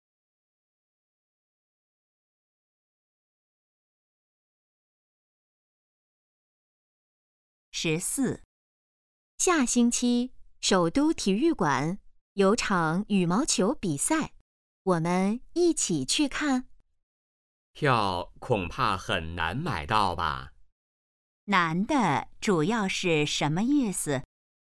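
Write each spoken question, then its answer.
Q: 难的主要是什么意思?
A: 票很难买到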